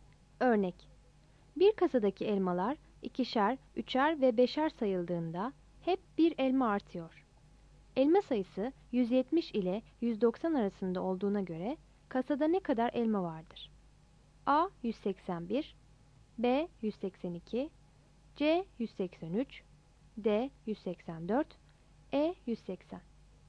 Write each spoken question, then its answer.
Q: Elma sayısı 170 ile 190 arasında olduğuna göre kasada ne kadar elma vardır?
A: Yanıt A'dır.